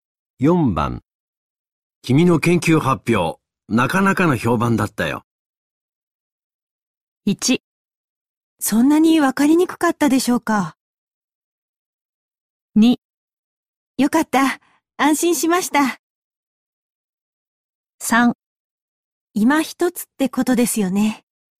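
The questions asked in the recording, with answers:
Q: 君の研究発表、なかなかの評判だったよ。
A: 2: よかった。安心しました。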